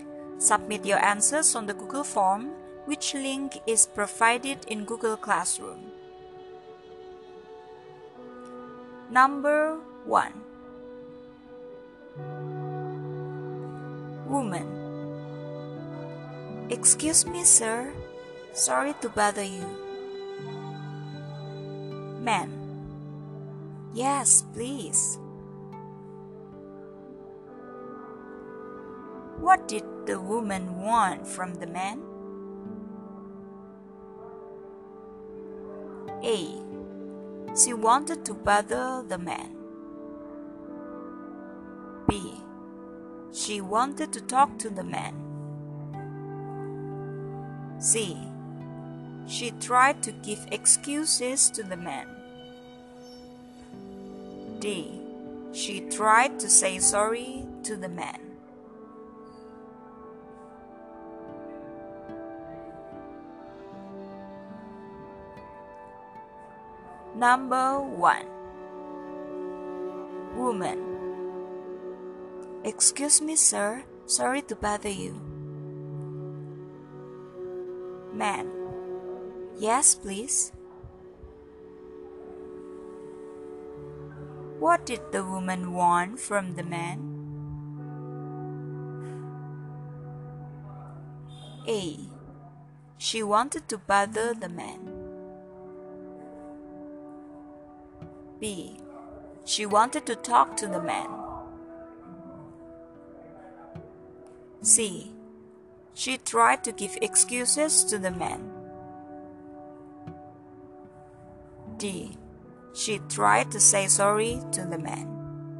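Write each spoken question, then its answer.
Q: What did the woman want from the man?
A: B: She wanted to talk to the man.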